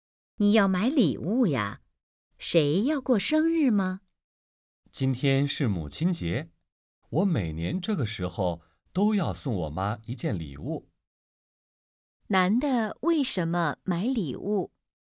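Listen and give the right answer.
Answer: 今天是母亲节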